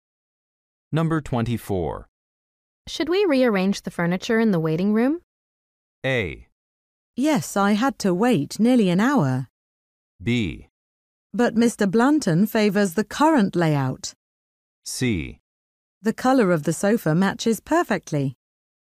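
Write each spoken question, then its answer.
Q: Should we rearrange the furniture in the waiting room?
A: B: But Mr. Blanton favors the current layout.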